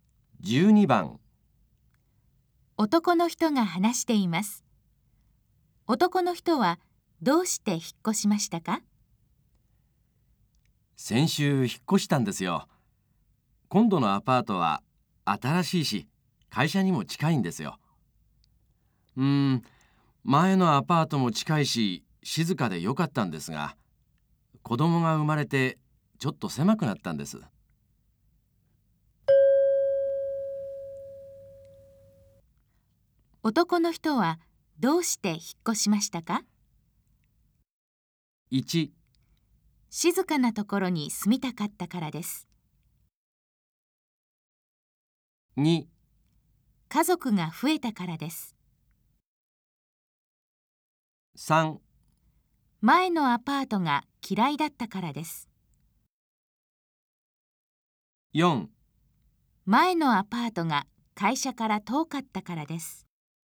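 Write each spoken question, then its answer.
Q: 男の人はどうして引っ越しましたか?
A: 2: 家族が増えたからです。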